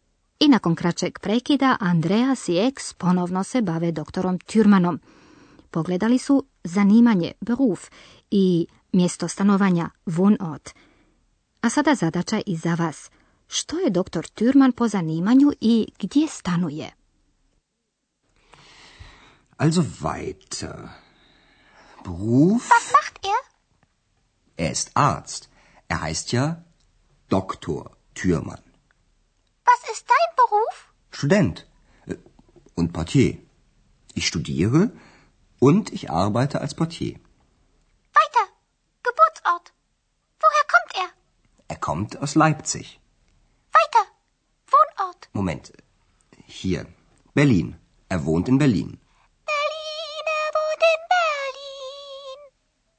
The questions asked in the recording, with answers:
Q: Što je doktor Türman po zanimanju i gdje stanuje?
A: Doktor je dakle liječnik i stanuje u Berlinu